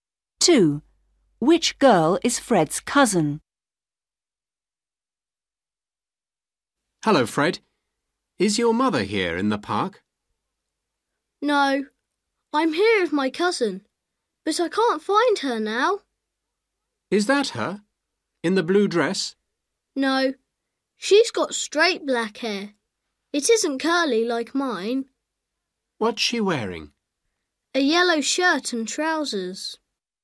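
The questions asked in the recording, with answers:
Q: Which girl is Fred's cousin?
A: the girl with straight black hair in a yellow shirt and trousers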